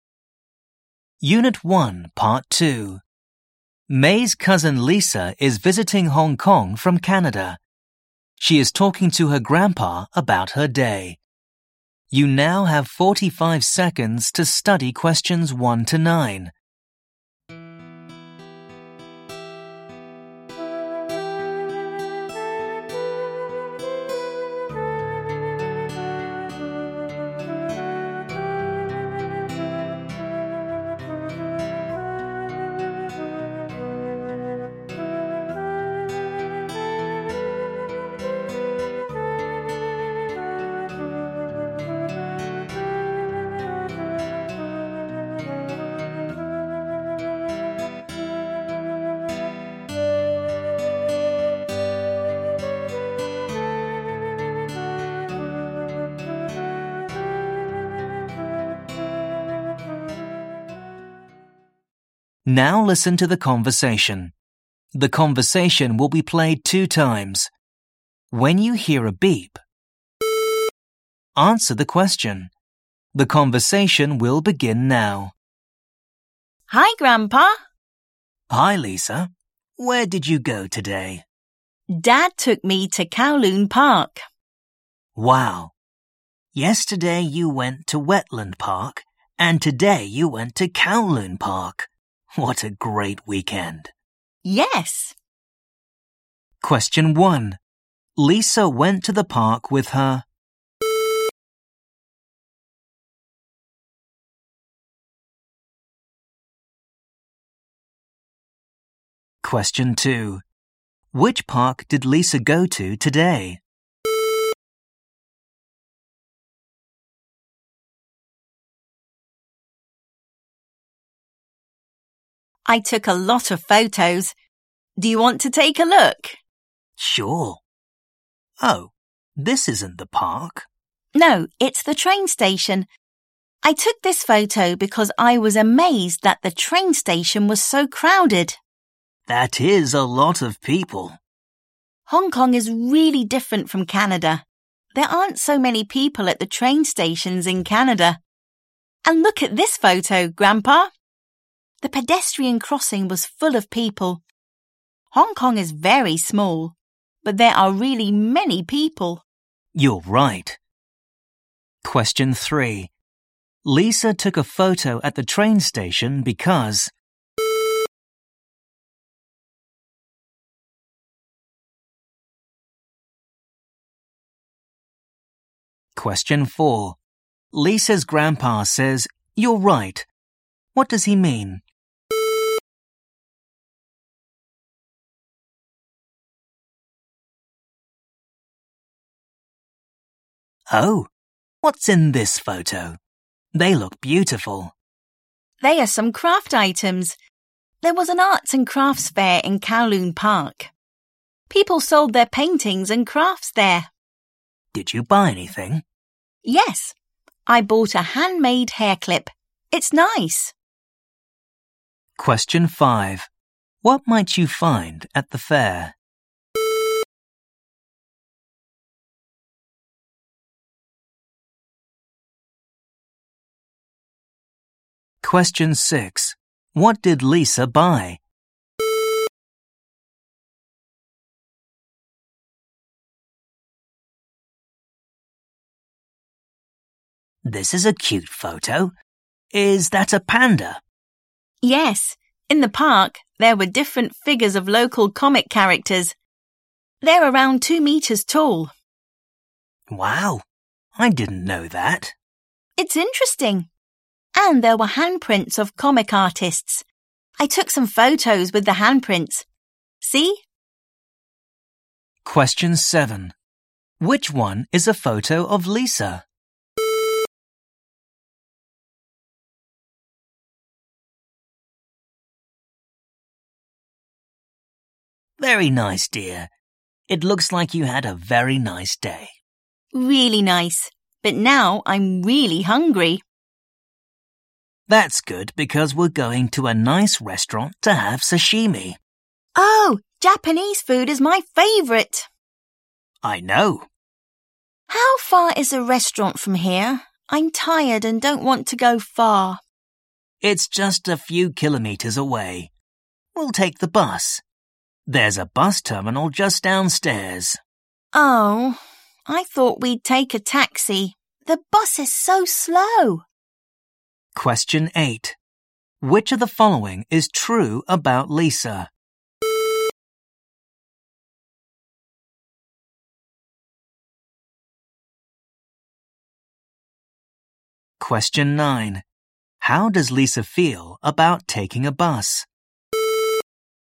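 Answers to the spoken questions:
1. dad
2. Kowloon Park
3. she was amazed that the train station was so crowded
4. He agrees that Hong Kong is small but has many people
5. paintings and crafts
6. a handmade hair clip
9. She doesn't want to; she thinks the bus is too slow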